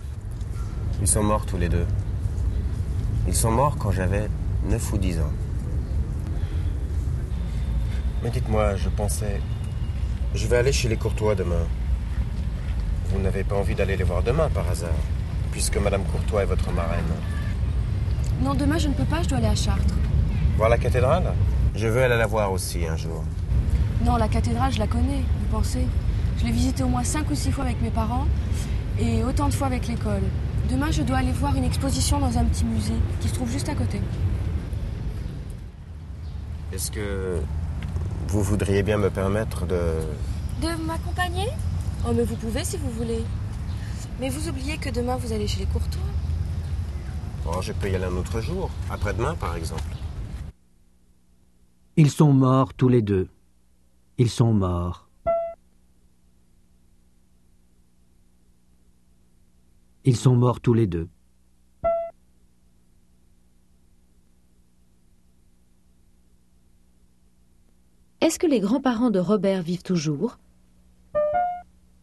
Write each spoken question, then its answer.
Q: Est-ce que les grands-parents de Robert vivent toujours ?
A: Non, ils sont morts.